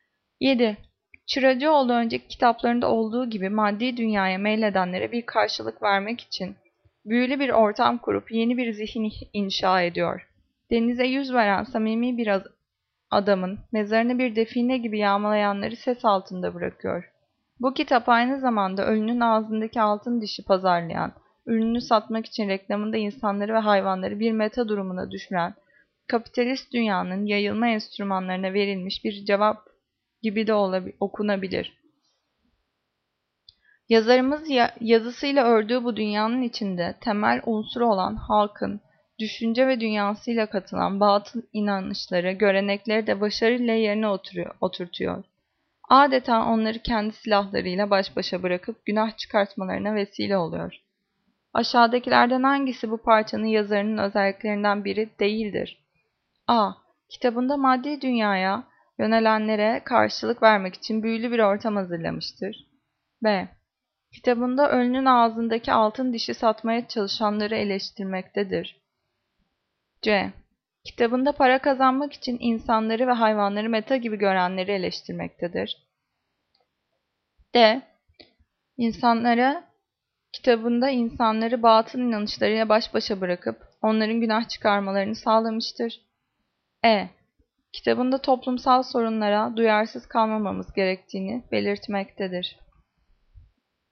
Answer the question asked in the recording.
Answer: Cevap E. Kitabında toplumsal sorunlara duyarsız kalmamamız gerektiğini belirtmektedir.